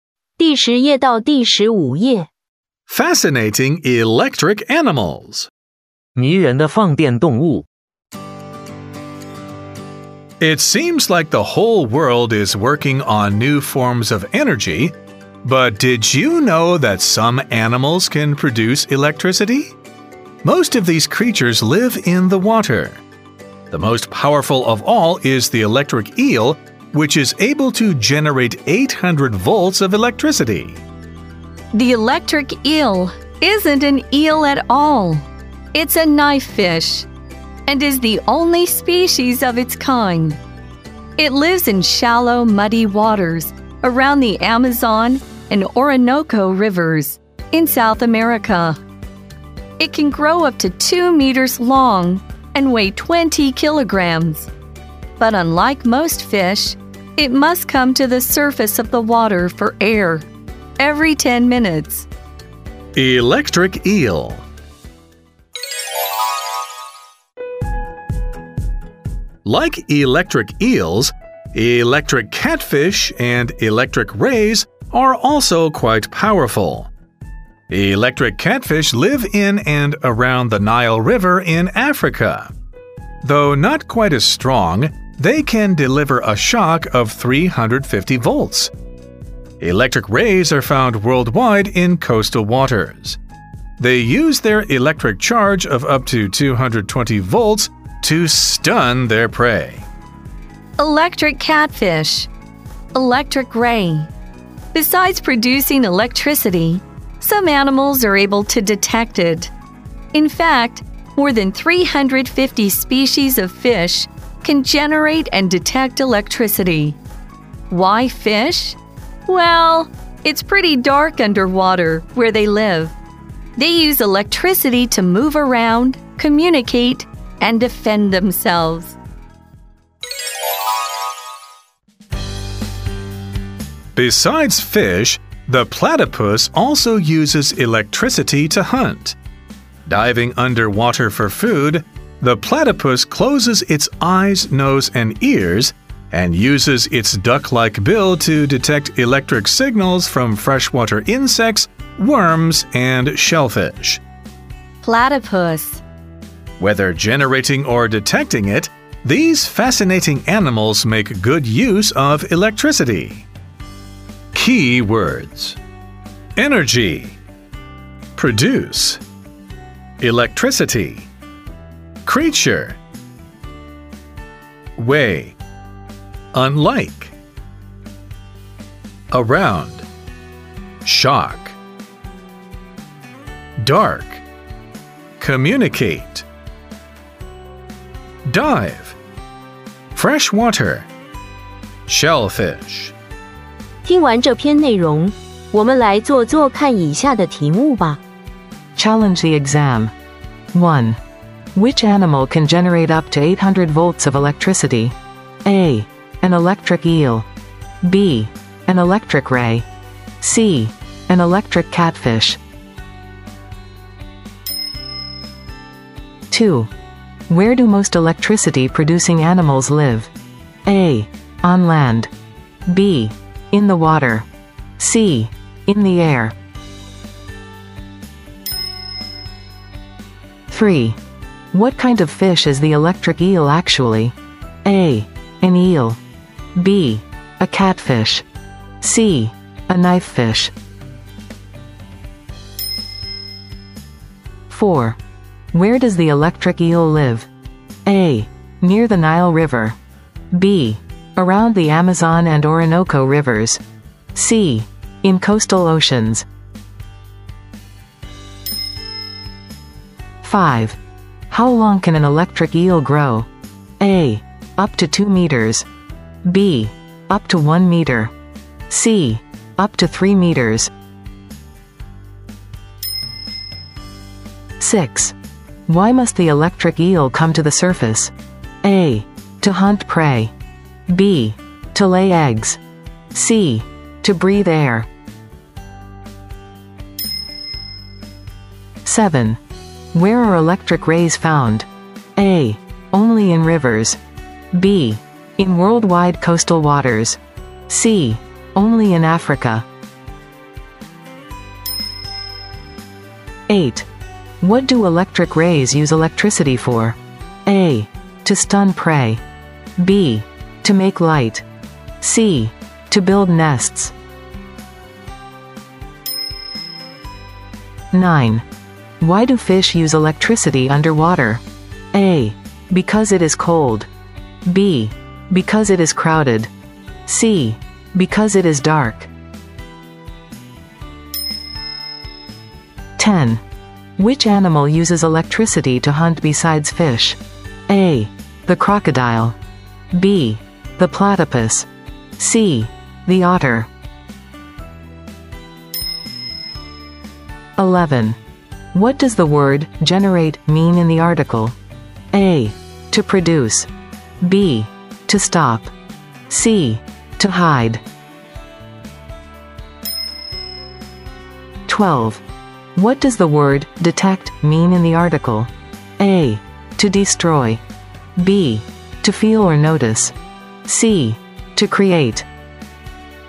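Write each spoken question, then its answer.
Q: Which animal can generate up to 800 volts of electricity?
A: A: An electric eel

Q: Where do most electricity-producing animals live?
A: B: In the water

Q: What kind of fish is the electric eel actually?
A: C: A knifefish

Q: Where does the electric eel live?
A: B: Around the Amazon and Orinoco rivers

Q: How long can an electric eel grow?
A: A: Up to 2 meters

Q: Why must the electric eel come to the surface?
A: C: To breathe air

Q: Where are electric rays found?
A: B: In worldwide coastal waters

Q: What do electric rays use electricity for?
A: A: To stun prey

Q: Why do fish use electricity underwater?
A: C: Because it is dark

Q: Which animal uses electricity to hunt besides fish?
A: B: The platypus

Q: What does the word generate mean in the article?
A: A: To produce

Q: What does the word detect mean in the article?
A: B: To feel or notice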